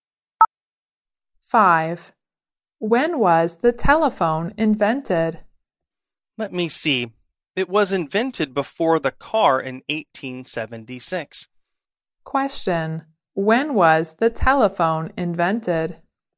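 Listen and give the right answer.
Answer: In 1876.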